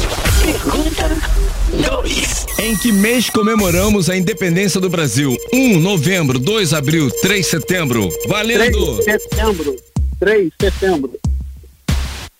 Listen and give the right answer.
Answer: 3 setembro.